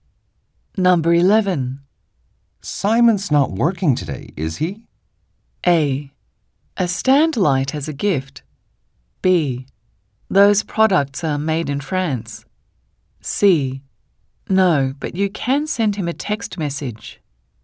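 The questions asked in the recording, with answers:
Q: Simon's not working today, is he?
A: C: No, but you can send him a text message.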